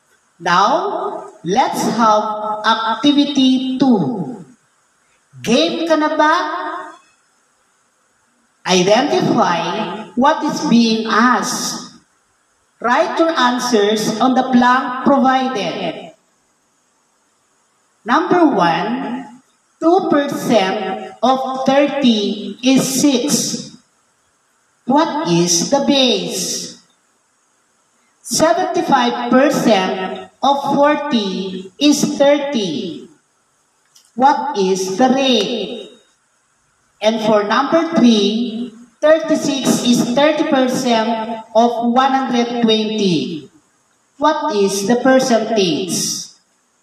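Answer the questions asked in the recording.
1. 30
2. 75%
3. 36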